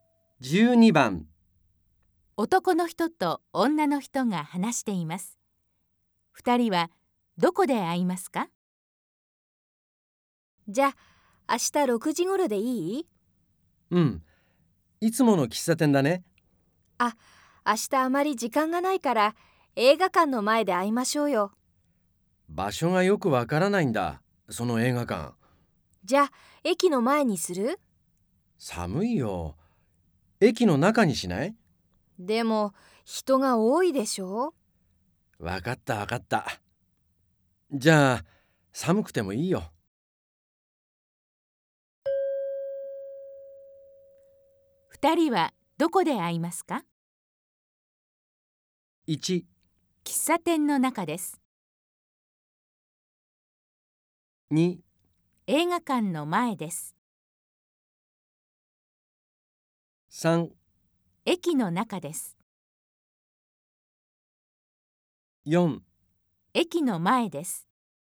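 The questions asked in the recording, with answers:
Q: 二人はどこで会いますか?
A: 4: 駅の前です。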